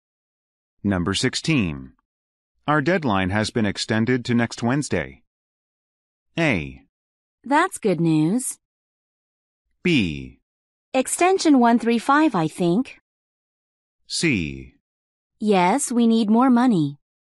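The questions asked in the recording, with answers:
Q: Our deadline has been extended to next Wednesday.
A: A: That's good news.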